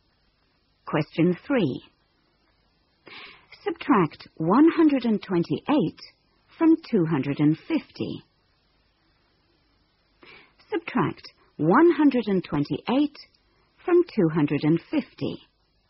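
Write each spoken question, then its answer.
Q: Subtract 128 from 250.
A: 122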